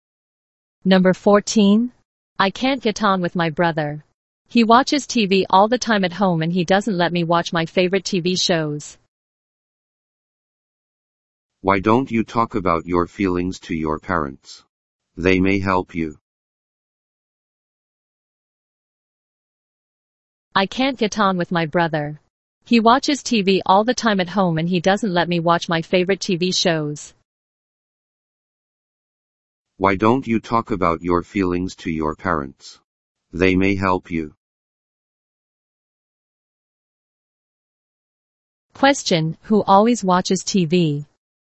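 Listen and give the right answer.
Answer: The speaker's brother.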